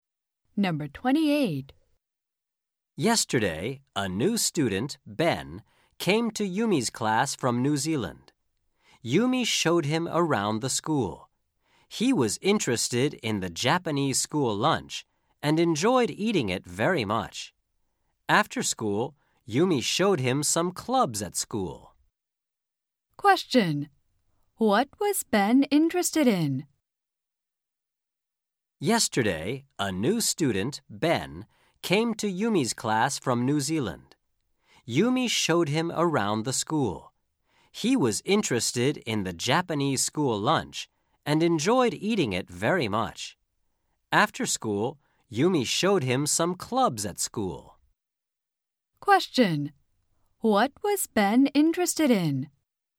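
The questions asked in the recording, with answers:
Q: What was Ben interested in?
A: The Japanese school lunch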